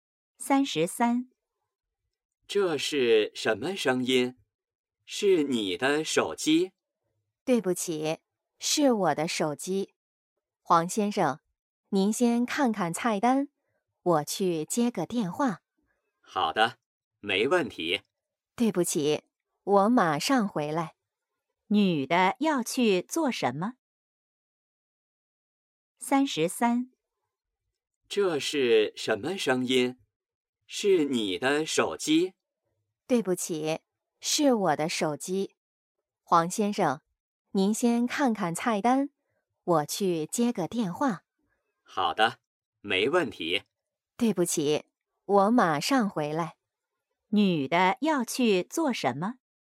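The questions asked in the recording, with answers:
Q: 女的要去做什么?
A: 接电话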